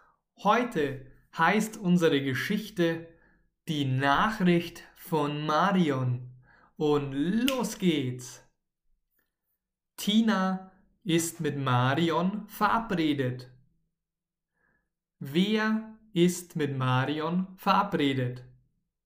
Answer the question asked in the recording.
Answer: Tina. Tina ist mit Marion verabredet.